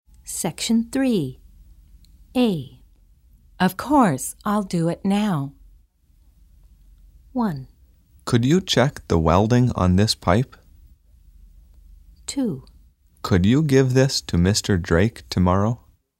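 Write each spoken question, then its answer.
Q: Of course, I'll do it now.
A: 1: Could you check the welding on this pipe?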